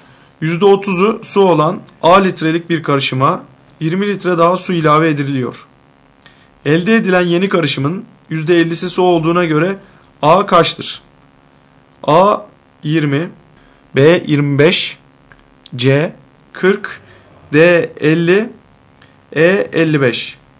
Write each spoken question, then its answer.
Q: Elde edilen yeni karışımın %50'si su olduğuna göre A kaçtır?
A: Doğru cevap D 50.